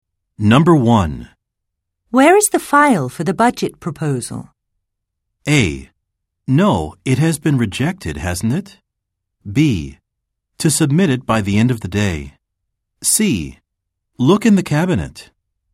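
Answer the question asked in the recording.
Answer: C: Look in the cabinet.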